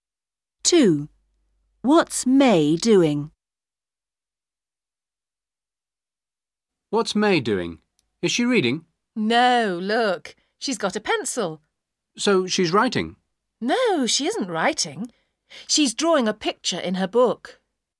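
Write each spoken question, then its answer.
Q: What's May doing?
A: Drawing a picture in her book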